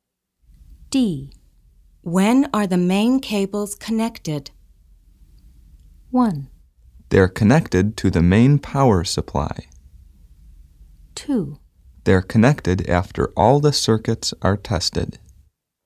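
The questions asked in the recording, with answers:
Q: When are the main cables connected?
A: 2: They're connected after all the circuits are tested.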